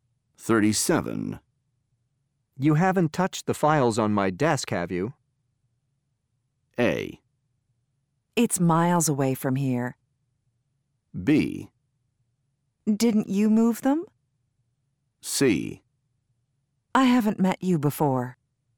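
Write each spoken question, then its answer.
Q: You haven't touched the files on my desk, have you?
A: B: Didn't you move them?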